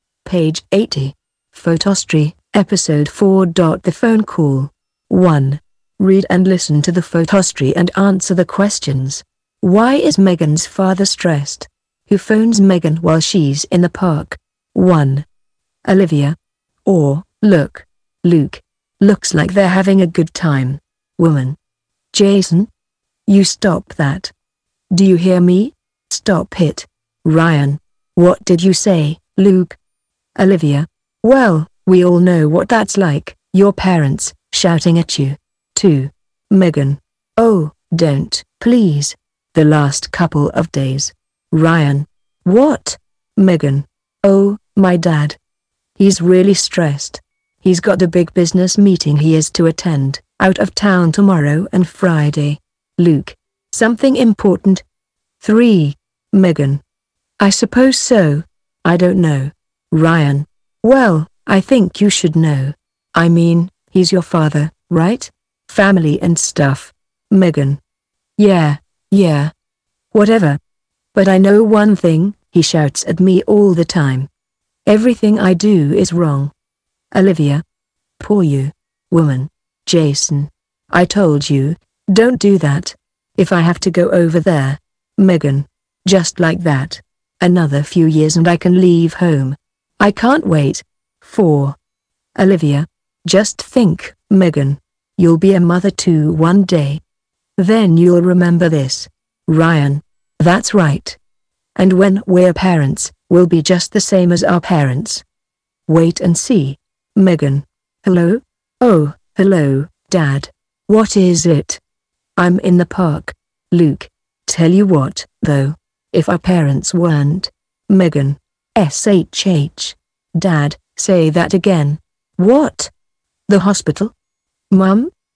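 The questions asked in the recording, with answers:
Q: Why is Megan's father stressed?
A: He has a big business meeting out of town tomorrow and Friday.

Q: Who phones Megan while she's in the park?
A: Her dad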